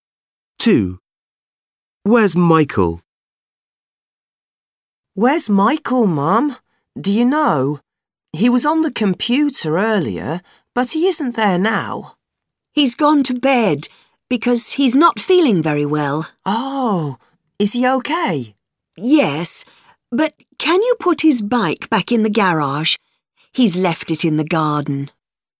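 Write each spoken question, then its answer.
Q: Where's Michael?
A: In bed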